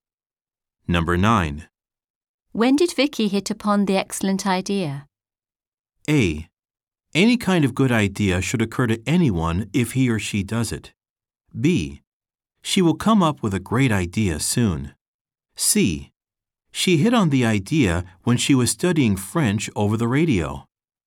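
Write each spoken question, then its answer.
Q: When did Vicky hit upon the excellent idea?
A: C: She hit on the idea when she was studying French over the radio.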